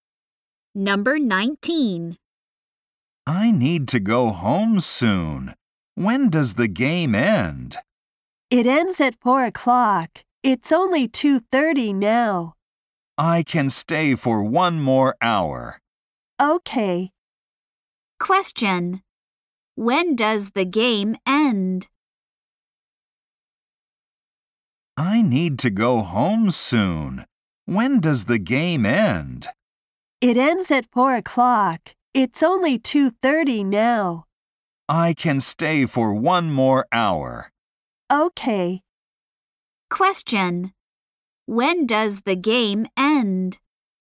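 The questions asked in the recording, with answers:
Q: When does the game end?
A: At 4 o'clock.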